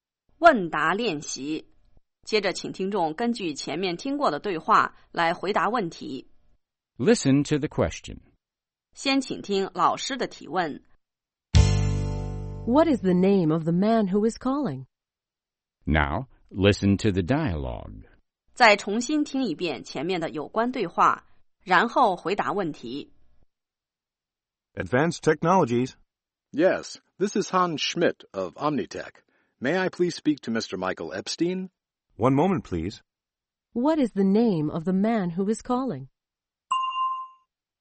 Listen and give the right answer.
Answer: His name is Hans Schmidt.